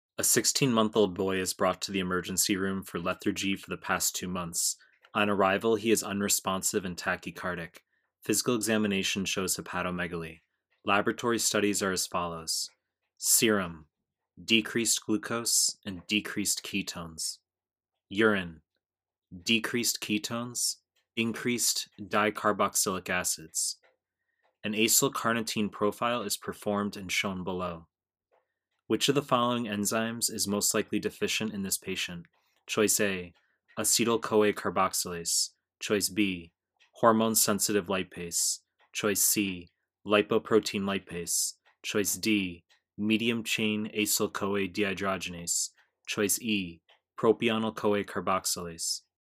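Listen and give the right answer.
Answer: D: medium-chain acyl-CoA dehydrogenase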